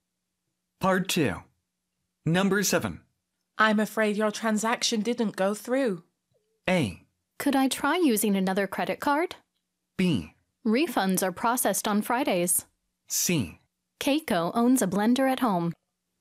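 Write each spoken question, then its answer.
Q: I'm afraid your transaction didn't go through.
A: A: Could I try using another credit card?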